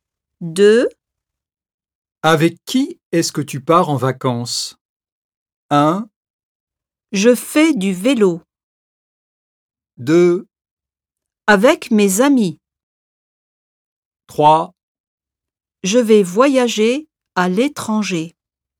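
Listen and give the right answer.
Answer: 2: Avec mes amis.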